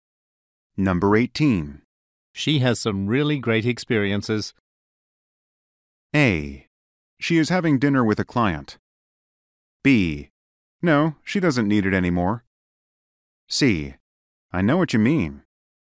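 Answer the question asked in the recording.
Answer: C: I know what you mean.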